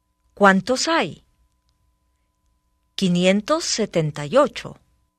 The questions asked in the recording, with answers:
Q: ¿Cuántos hay? 578.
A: Hay 578.